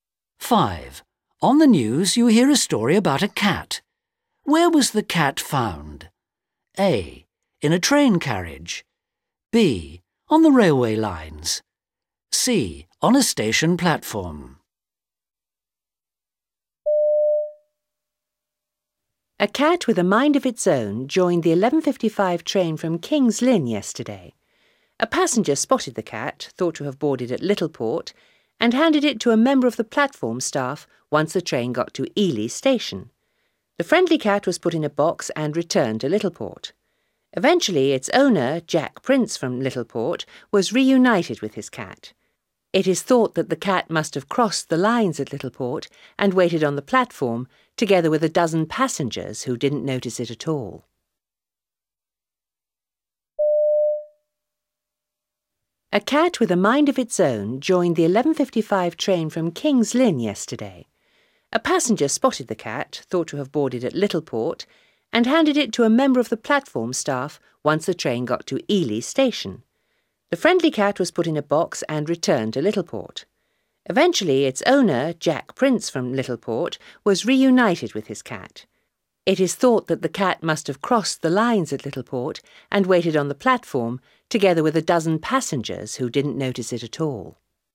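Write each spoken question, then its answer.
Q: Where was the cat found?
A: A: In a train carriage.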